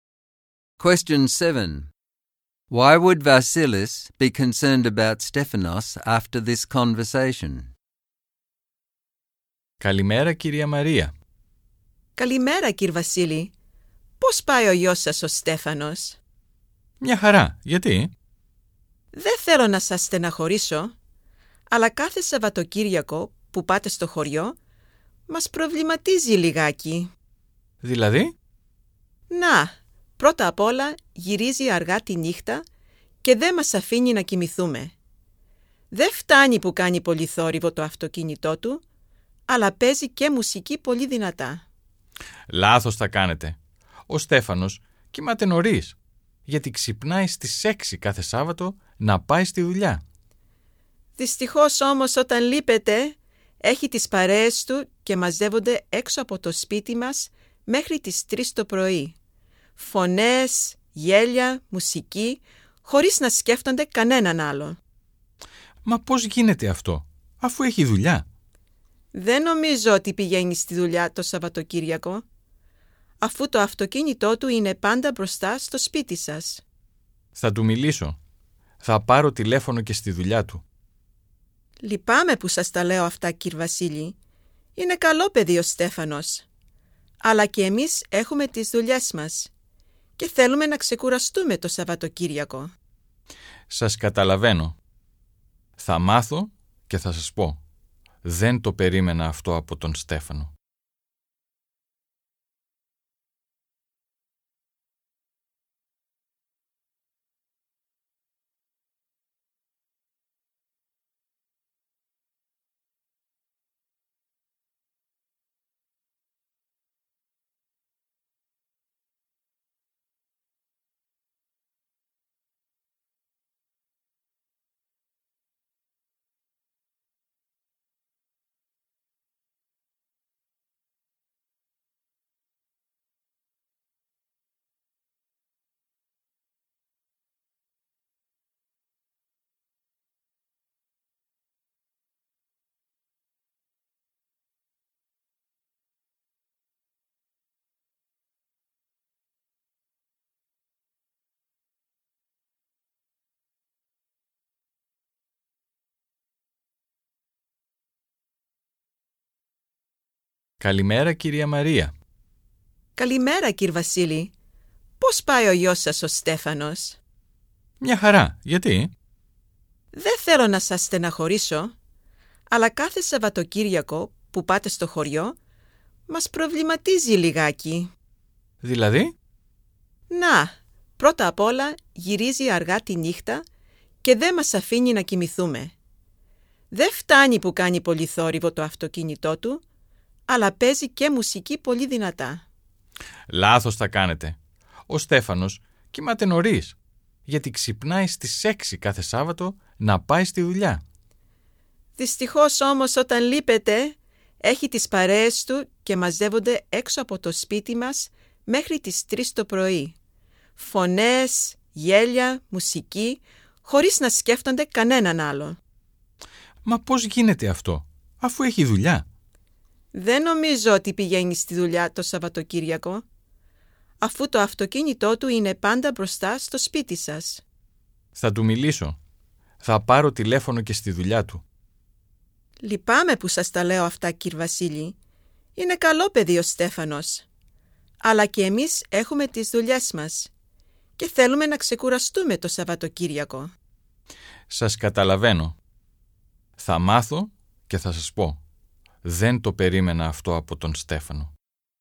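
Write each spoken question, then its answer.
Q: Why would Vasilis be concerned about Stephanos after this conversation?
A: Stephanos comes home late at night with a noisy car and loud music. When his parents are away, his friends gather outside until 3 a.m. His car is always in front of the house at weekends, so he is probably not going to work as he claims.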